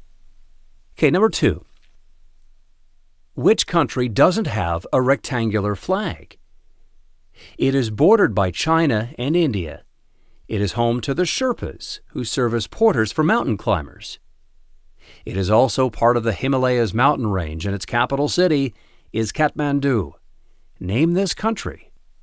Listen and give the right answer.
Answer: The answer is Nepal.